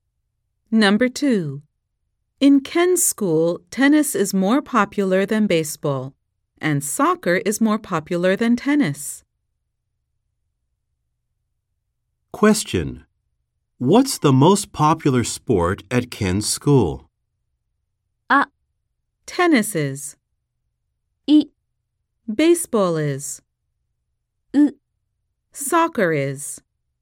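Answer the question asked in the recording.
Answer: C: Soccer is.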